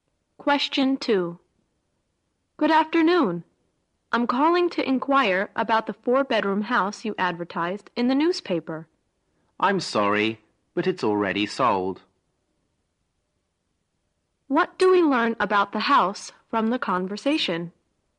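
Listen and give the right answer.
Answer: It has already been sold.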